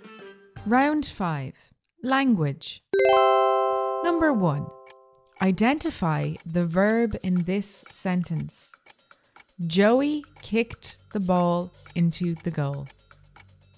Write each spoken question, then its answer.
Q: identify the verb in this sentence.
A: The verb, the action word, is kicked.